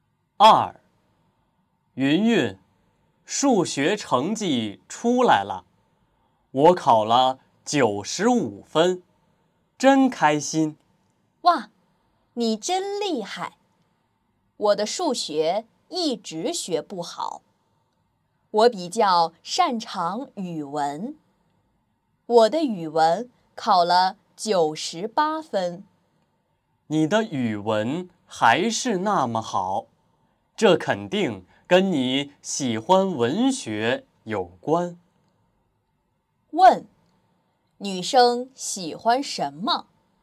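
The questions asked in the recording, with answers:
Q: 问,女生喜欢什么?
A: 文学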